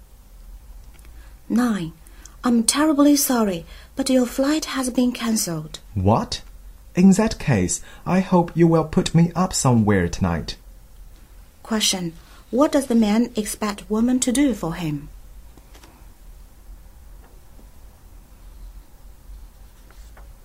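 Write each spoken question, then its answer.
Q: What does the man expect woman to do for him?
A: Arrange accommodation for him tonight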